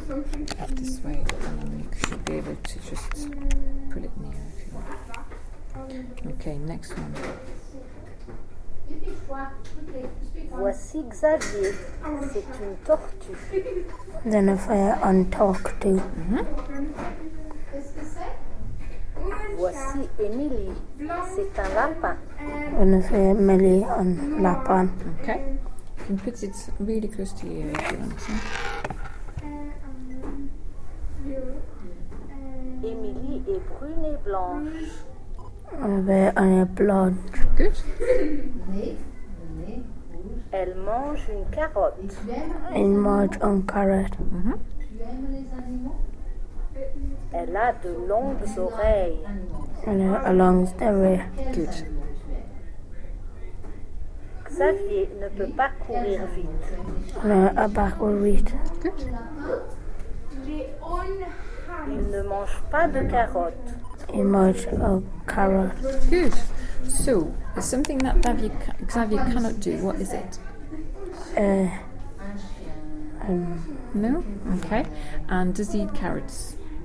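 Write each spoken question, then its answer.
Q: So, is something that Xavier cannot do, what is it?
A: Run fast

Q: And does he eat carrots?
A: No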